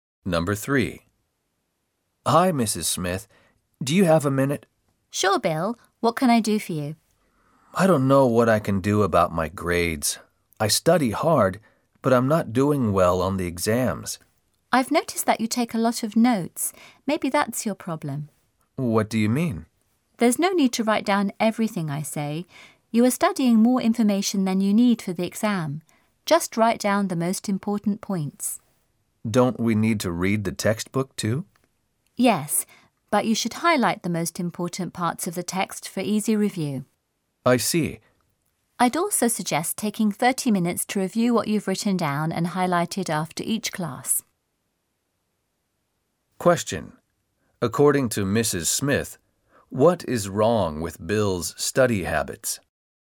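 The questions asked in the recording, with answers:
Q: According to Mrs. Smith, what is wrong with Bill's study habits?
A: He takes too many notes, writing down everything instead of just the most important points.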